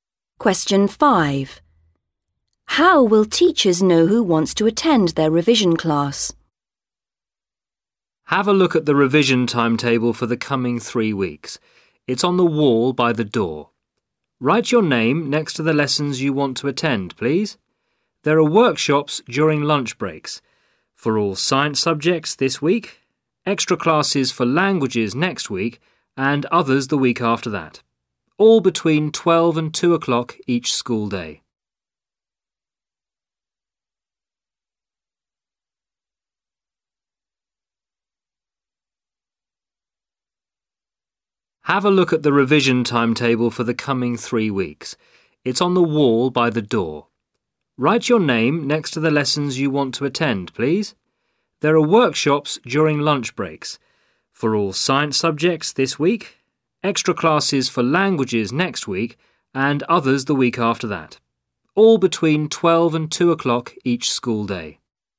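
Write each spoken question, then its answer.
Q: How will teachers know who wants to attend their revision class?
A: Students write their names on the timetable next to the lessons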